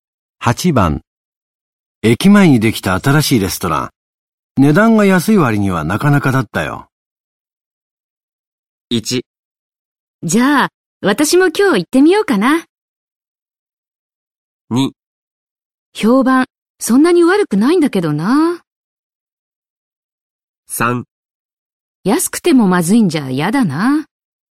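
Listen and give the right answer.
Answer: 1: じゃあ、私も今日行ってみようかな。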